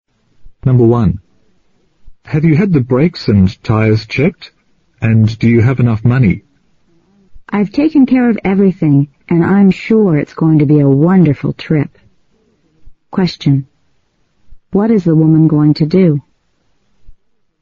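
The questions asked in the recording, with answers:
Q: What is the woman going to do?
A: Go on a trip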